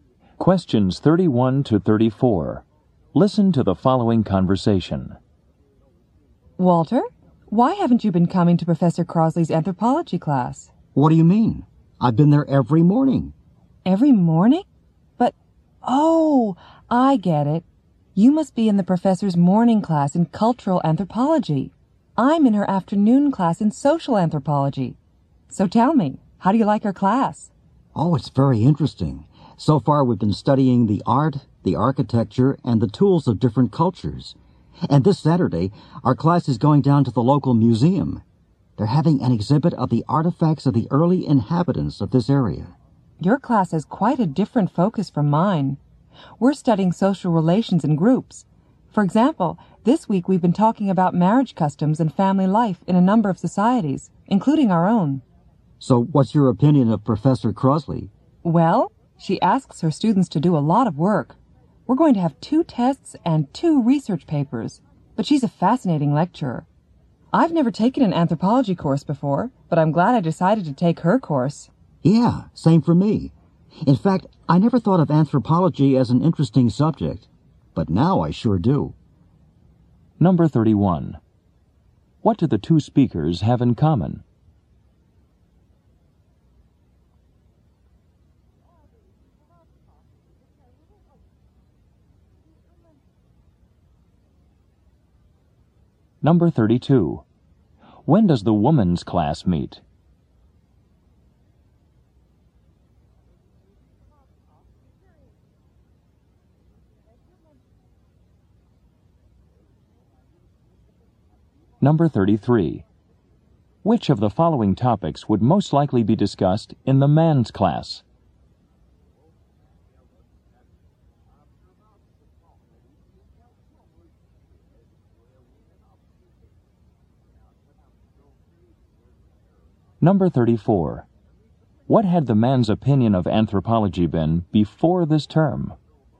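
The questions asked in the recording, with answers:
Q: What do the 2 speakers have in common?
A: They both take Professor Crosley's anthropology class

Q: When does the woman's class meet?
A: In the afternoon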